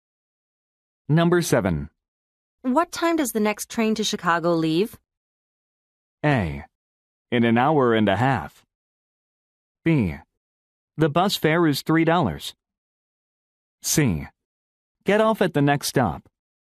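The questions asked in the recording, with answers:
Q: What time does the next train to Chicago leave?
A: A: In an hour and a half.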